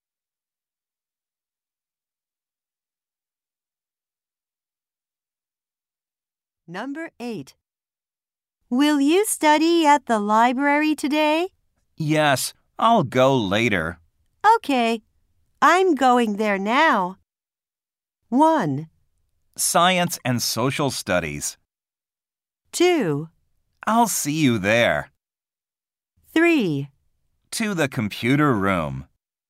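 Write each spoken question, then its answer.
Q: Okay, I'm going there now.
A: 2: I'll see you there.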